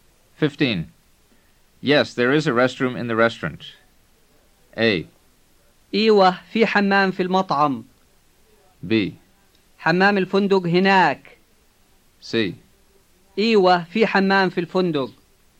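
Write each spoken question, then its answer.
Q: Yes, there is a restroom in the restaurant.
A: A: إيوه في حمام في المطعم.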